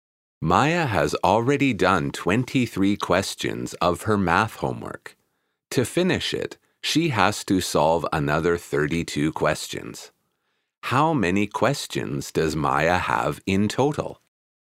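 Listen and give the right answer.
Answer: 55 questions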